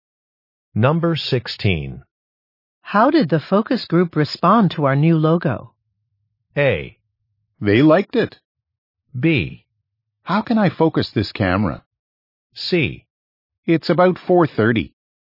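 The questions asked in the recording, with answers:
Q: How did the focus group respond to our new logo?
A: A: They liked it.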